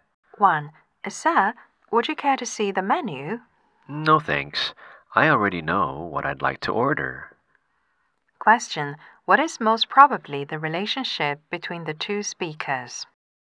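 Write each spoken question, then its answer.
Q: What is most probably the relationship between the two speakers?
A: Waiter and customer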